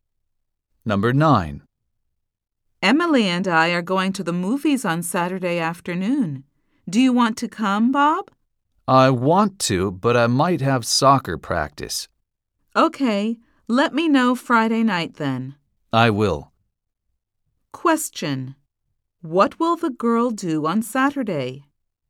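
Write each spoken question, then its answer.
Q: Question: What will the girl do on Saturday?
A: Go to the movies with Emily.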